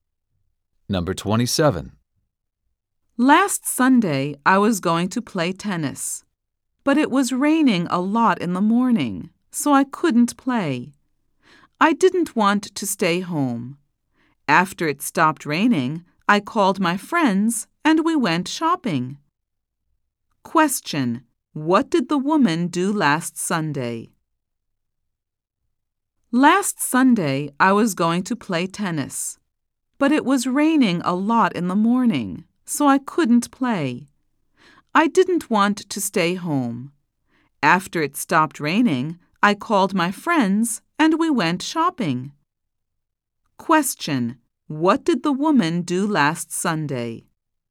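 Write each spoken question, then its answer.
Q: What did the woman do last Sunday?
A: She went shopping with her friends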